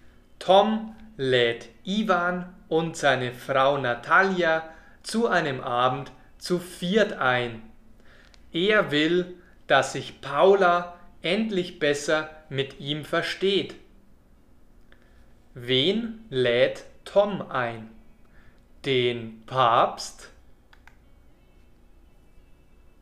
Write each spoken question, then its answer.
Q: Wen lädt Tom ein? Den Papst?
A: Er lädt Ivan und seine Frau Natalia zu einem Abend zu viert ein.